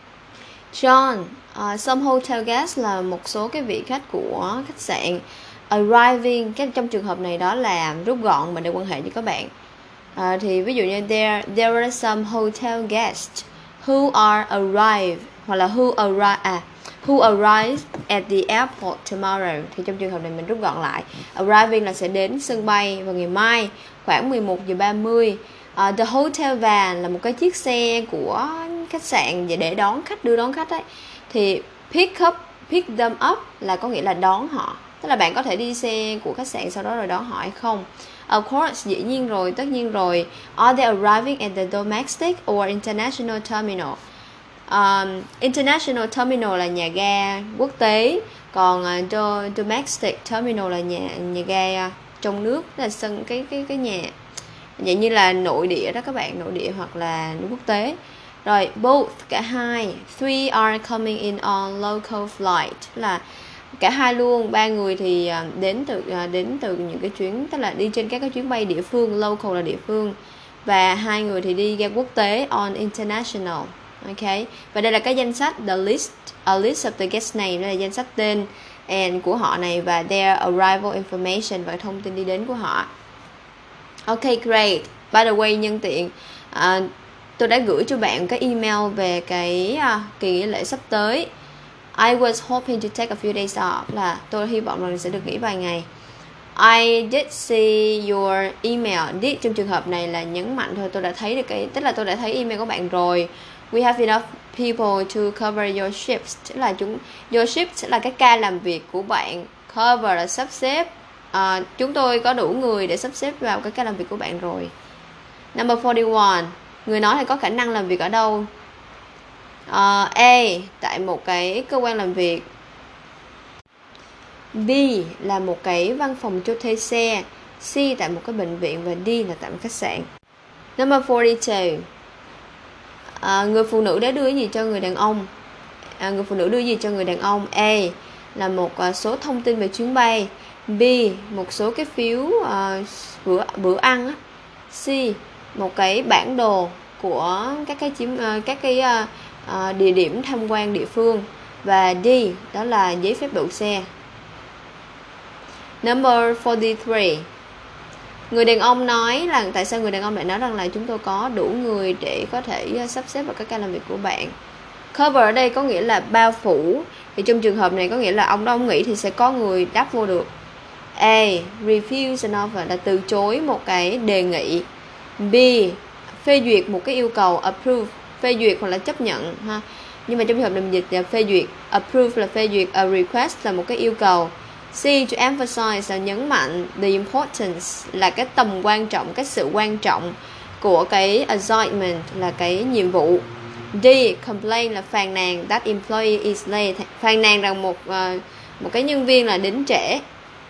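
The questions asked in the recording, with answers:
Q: Người nói là có khả năng làm việc ở đâu?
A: D: Là tại một khách sạn.

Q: Người phụ nữ đã đưa gì cho người đàn ông?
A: A: một số thông tin về chuyến bay.

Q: tại sao người đàn ông lại nói rằng là chúng tôi có đủ người để có thể sắp xếp vào các ca làm việc của bạn?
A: B: Phê duyệt một cái yêu cầu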